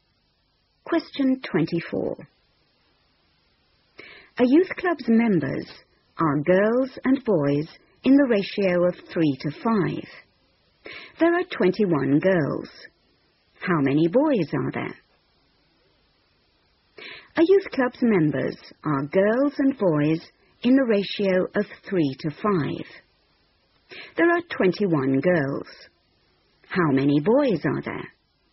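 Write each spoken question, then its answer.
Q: There are 21 girls. How many boys are there?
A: 35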